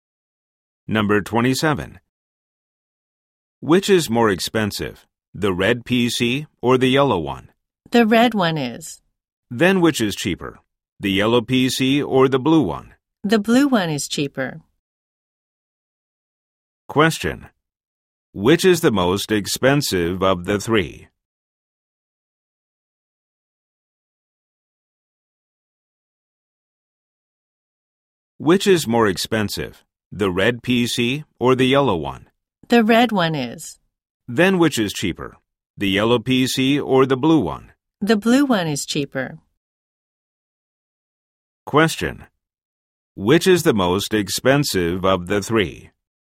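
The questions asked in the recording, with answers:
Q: Which is the most expensive of the three?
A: The red PC.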